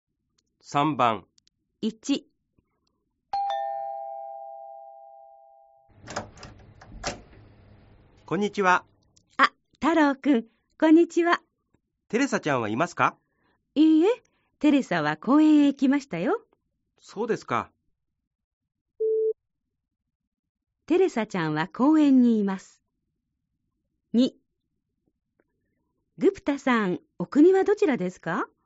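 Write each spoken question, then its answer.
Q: テレサちゃんは公園にいます。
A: ○(正しい)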